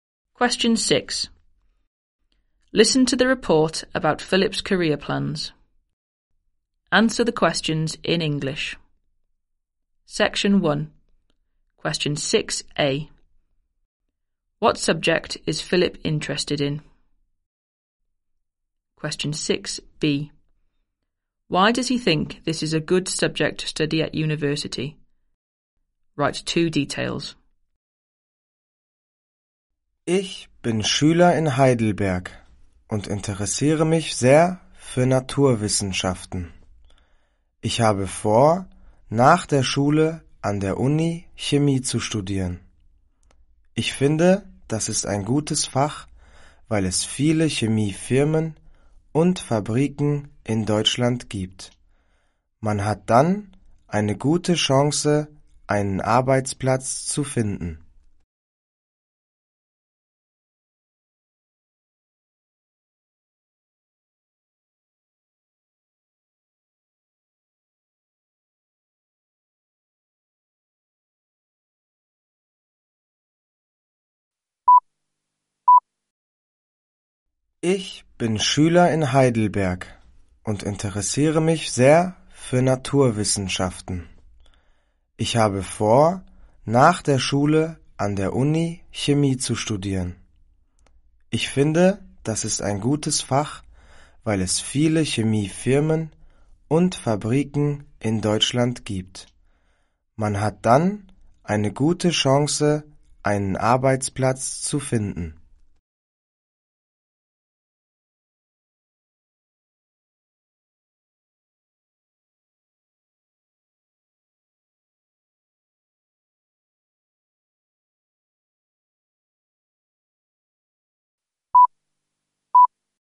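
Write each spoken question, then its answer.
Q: What subject is Philip interested in?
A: Science (chemistry)

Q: Why does he think this is a good subject to study at university?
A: There are many chemical companies and factories in Germany; good chance of finding a job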